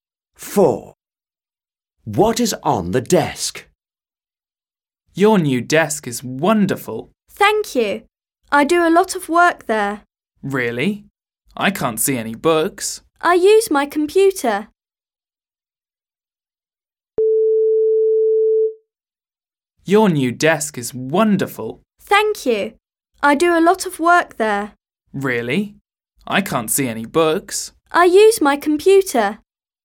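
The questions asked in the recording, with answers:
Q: What is on the desk?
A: a computer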